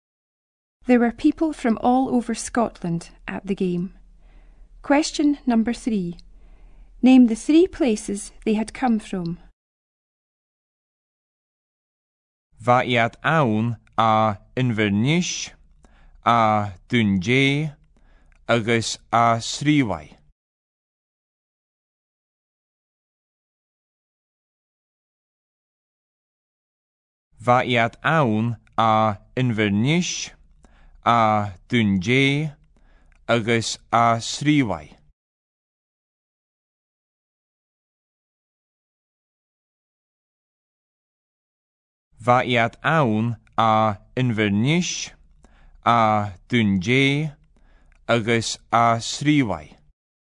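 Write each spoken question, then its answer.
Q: Name the three places they had come from.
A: Inverness, Dundee and Stornoway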